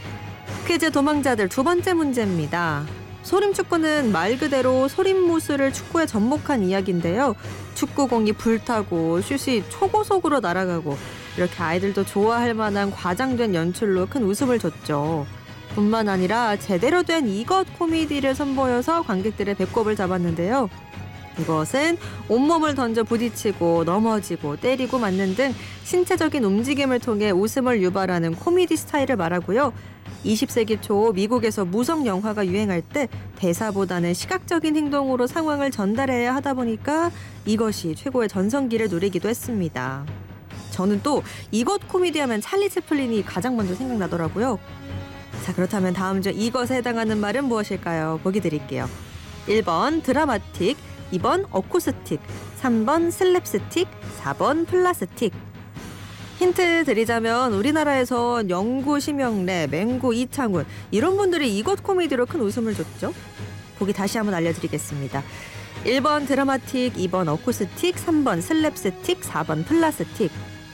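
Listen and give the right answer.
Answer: 3: 슬랩스틱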